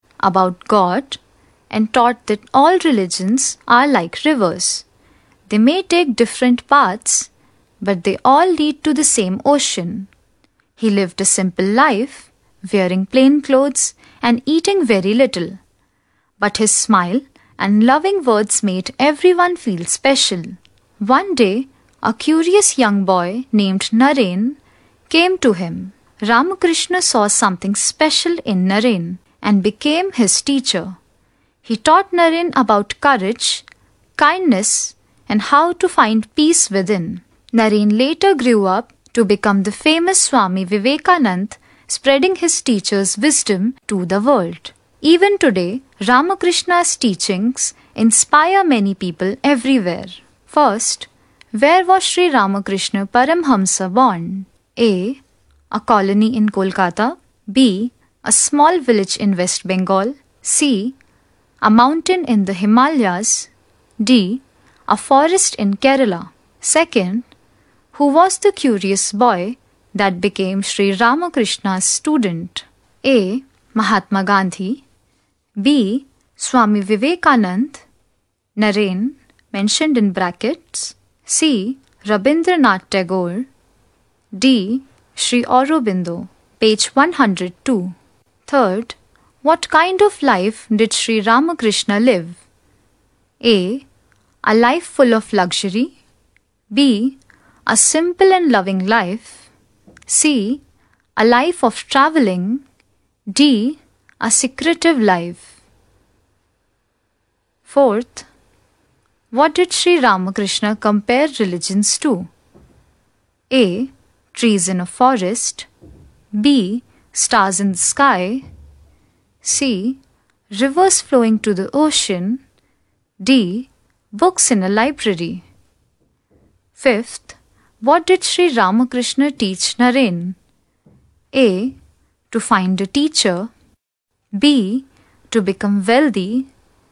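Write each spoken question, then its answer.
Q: who was the curious boy that became Sri Ramakrishna's student?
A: B: Swami Vivekanand.

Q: what kind of life did Sri Ramakrishna live?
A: B: A simple and loving life.

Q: what did Sri Ramakrishna compare religions to?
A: C: Rivers flowing to the ocean.

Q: what did Sri Ramakrishna teach Naren?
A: D: To find peace.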